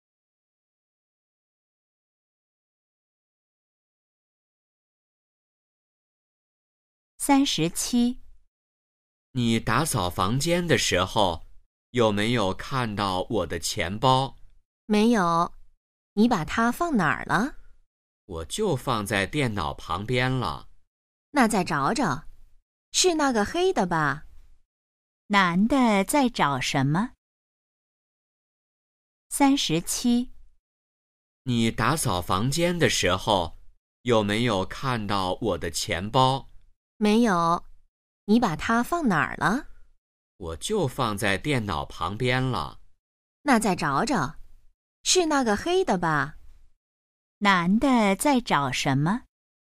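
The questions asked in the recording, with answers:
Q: 男的在找什么?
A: 钱包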